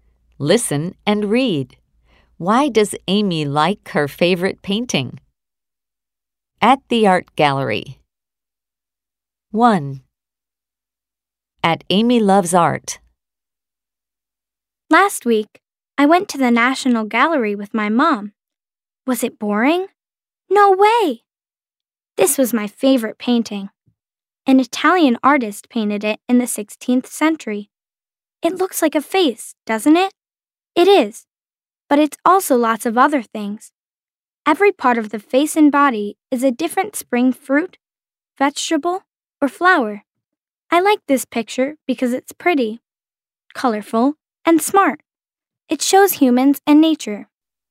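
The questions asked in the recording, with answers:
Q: Why does Amy like her favorite painting?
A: Because it's pretty, colorful, and smart, and it shows humans and nature.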